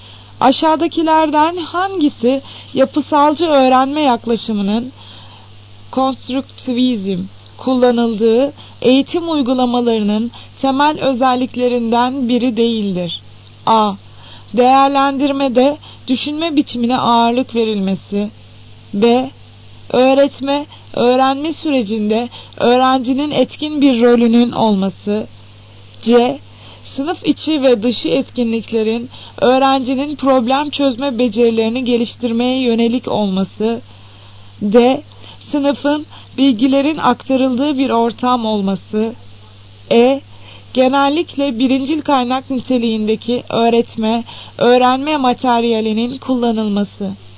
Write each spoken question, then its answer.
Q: Aşağıdakilerden hangisi yapısalcı öğrenme yaklaşımının konstruktivizm kullanıldığı eğitim uygulamalarının temel özelliklerinden biri değildir.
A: Cevap D şıkkı. Sınıfın bilgilerin aktarıldığı bir ortam olması.